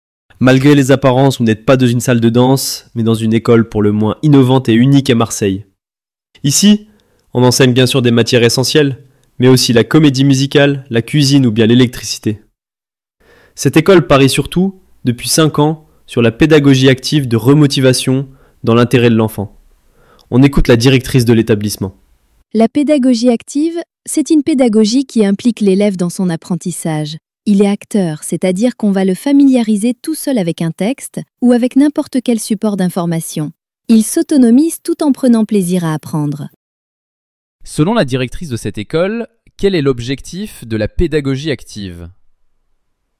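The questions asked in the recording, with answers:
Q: Selon la directrice de cette école, quel est l'objectif de la pédagogie active ?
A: Impliquer l'élève dans son apprentissage pour qu'il devienne autonome tout en prenant plaisir à apprendre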